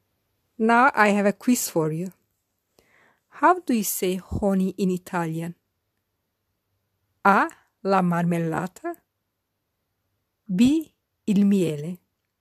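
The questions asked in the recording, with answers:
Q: How do you say honey in Italian?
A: B: Il miele.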